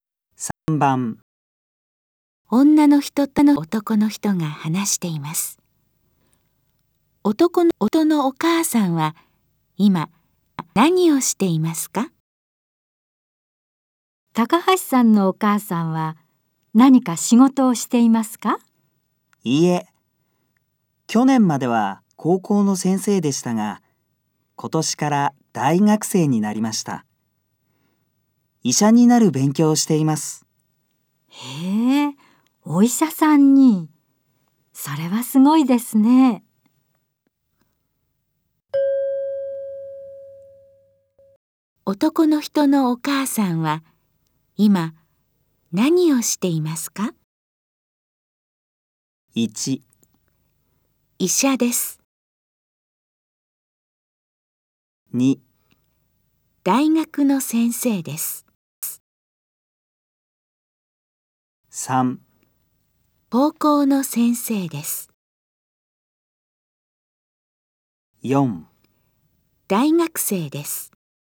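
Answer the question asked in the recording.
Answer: 4: 大学生です。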